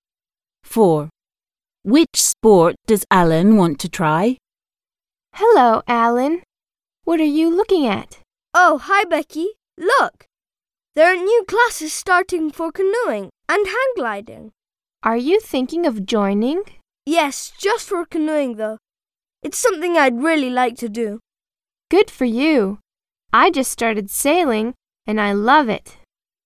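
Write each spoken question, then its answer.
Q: Which sport does Alan want to try?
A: canoeing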